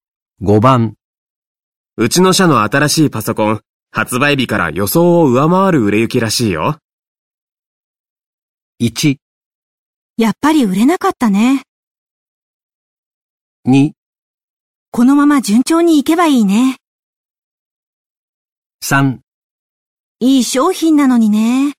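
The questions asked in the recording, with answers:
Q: うちの社の新しいパソコン、発売日から予想を上回る売れ行きらしいよ。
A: 2: このまま順調にいけばいいね。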